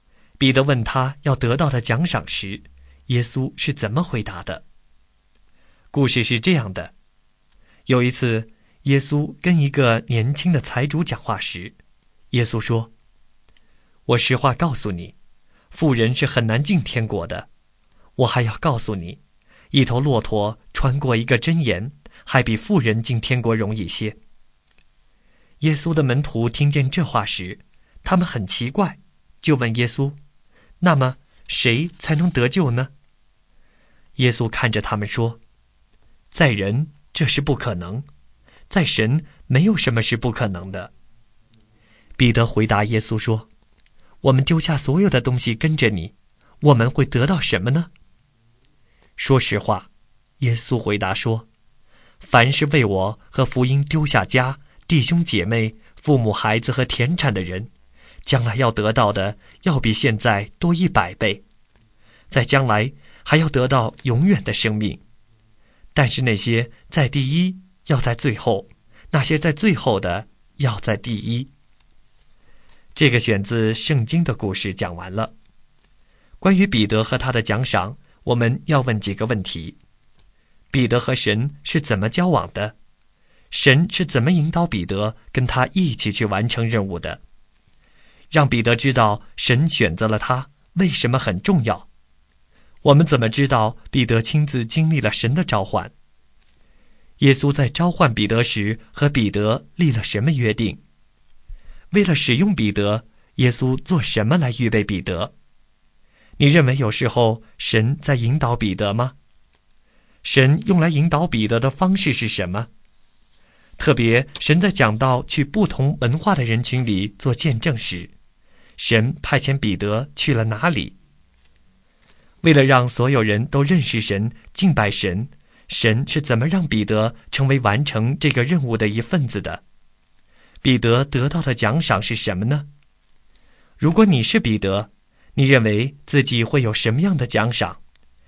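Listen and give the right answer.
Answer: 现在得到的要多100倍,将来还要得到永远的生命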